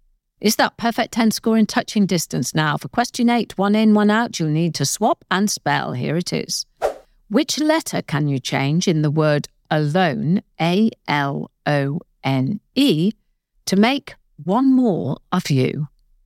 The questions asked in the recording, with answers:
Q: Which letter can you change in the word alone, A-L-O-N-E, to make one more of you.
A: You change the letter A for the letter C to get the word clone.